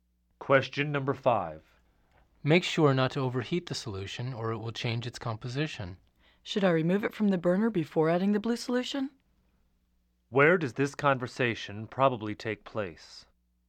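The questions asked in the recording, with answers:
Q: Where does this conversation probably take place?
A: In a laboratory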